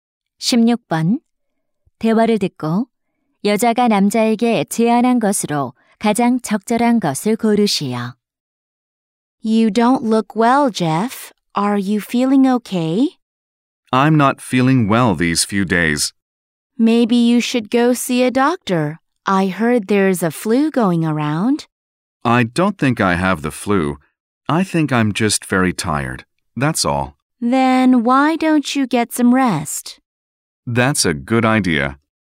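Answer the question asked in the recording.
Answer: 휴식 취하기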